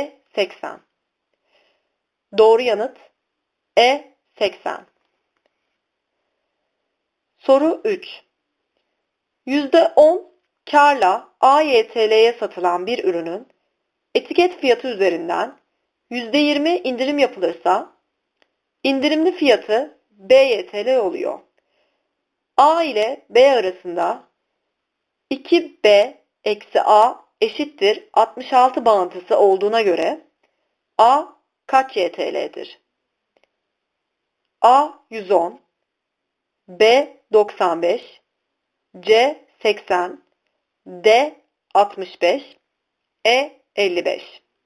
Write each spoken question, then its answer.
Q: 2B-A eşittir 66 bağıntısı olduğuna göre A kaç YTL'dir?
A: Doğru yanıt A 110.